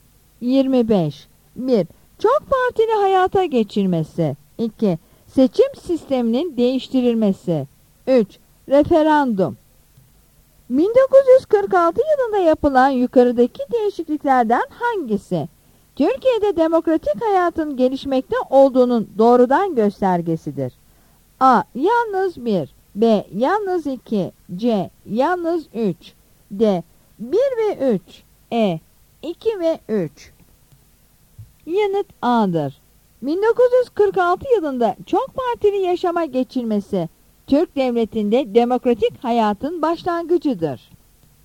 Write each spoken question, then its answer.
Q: 1946 yılında yapılan yukarıdaki değişikliklerden hangisi Türkiye'de demokratik hayatın gelişmekte olduğunun doğrudan göstergesidir?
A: Yanıt A'dır.